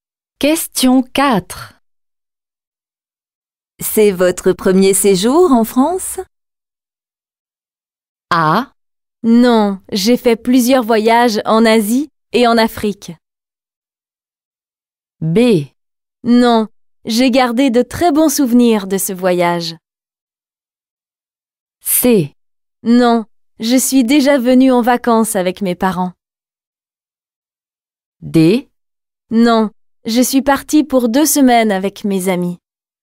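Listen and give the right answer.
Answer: C: Non, je suis déjà venue en vacances avec mes parents.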